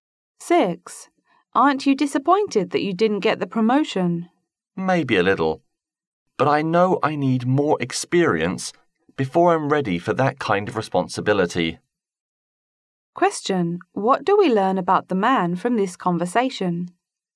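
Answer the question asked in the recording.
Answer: He feels he isn't ready yet for the promotion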